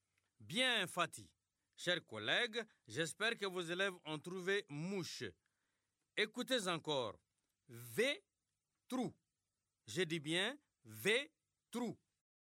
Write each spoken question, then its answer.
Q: Écoutez encore. V-trou. Je dis bien V-trou.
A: C'est trouvé.